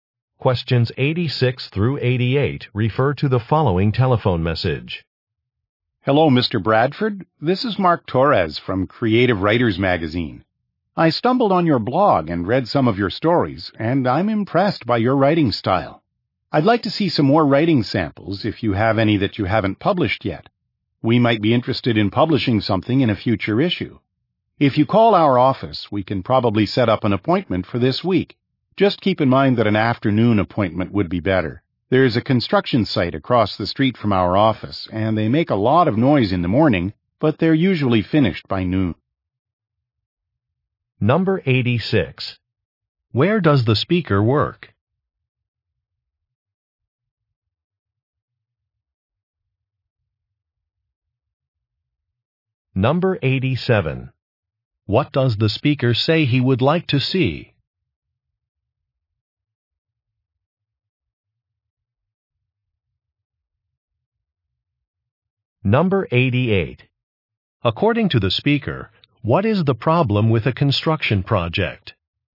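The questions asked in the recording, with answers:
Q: Where does the speaker work?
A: At a magazine

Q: What does the speaker say he would like to see?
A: More writing samples

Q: According to the speaker, what is the problem with a construction project?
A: It is noisy in the morning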